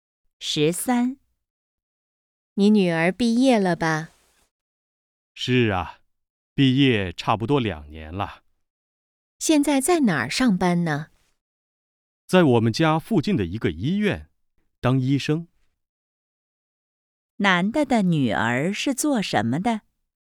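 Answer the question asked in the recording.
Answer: 医生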